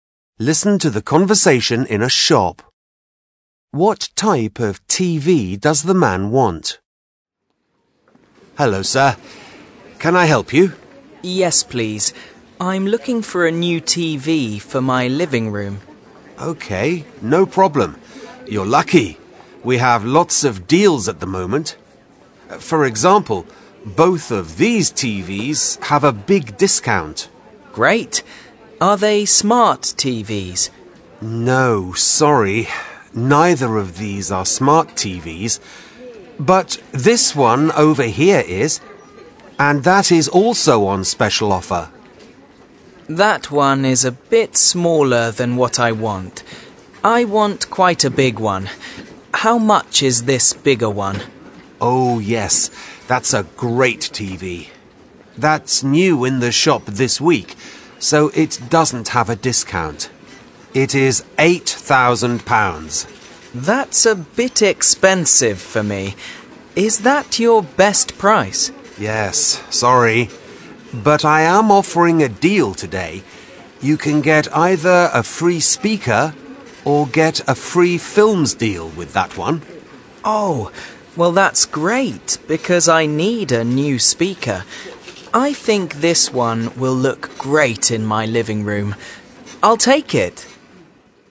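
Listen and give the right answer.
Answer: A big smart TV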